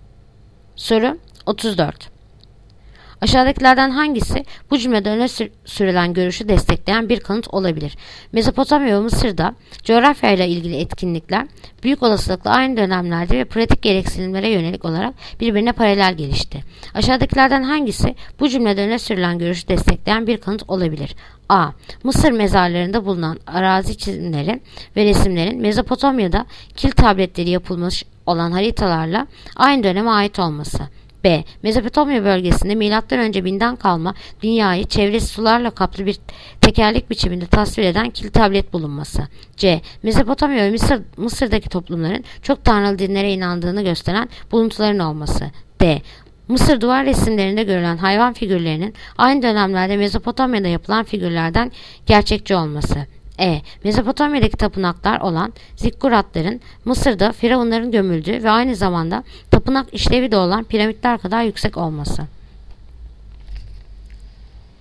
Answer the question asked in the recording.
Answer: Yanıt: Adana. Mısır mezarlarında bulunan arazi çizimleri ve resimlerin Mezopotamya'daki kil tabletlere yapılmış olan haritalarla aynı dönemde olması.